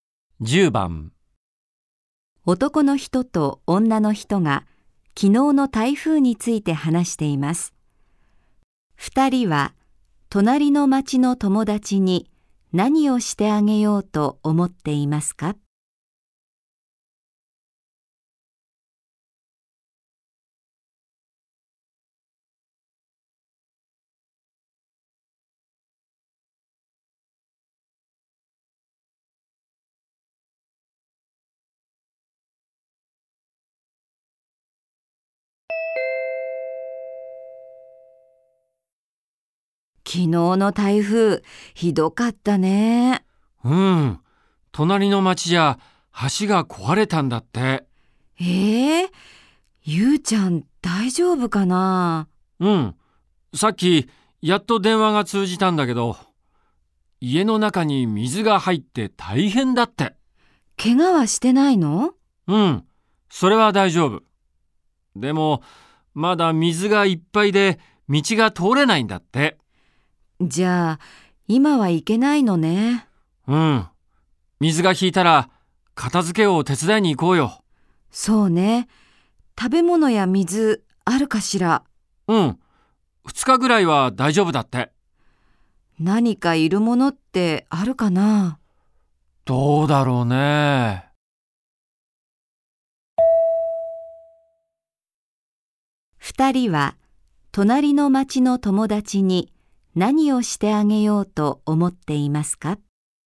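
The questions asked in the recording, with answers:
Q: 2人は隣の町の友達に何をしてあげようと思っていますか?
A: 水が引いたら家の片付けを手伝いに行く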